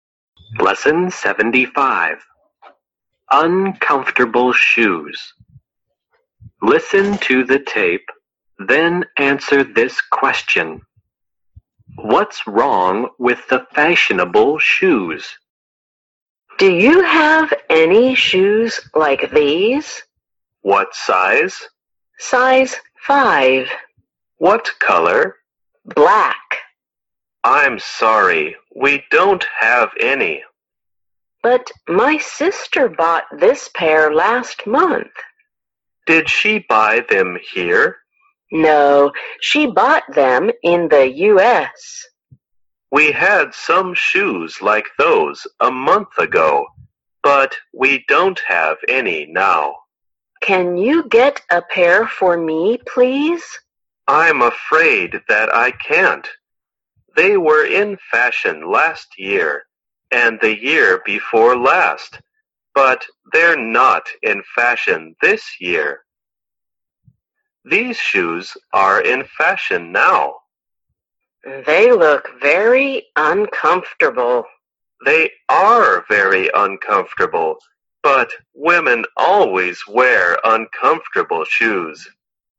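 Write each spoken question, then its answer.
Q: What's wrong with the fashionable shoes?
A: They are very uncomfortable.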